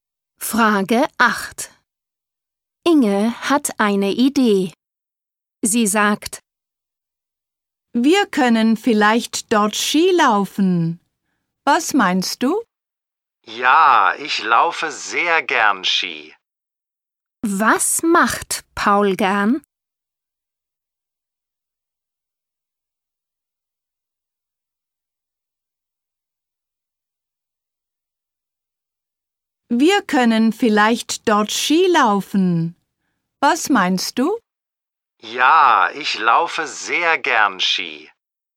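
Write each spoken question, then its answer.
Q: Was macht Paul gern?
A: Skilaufen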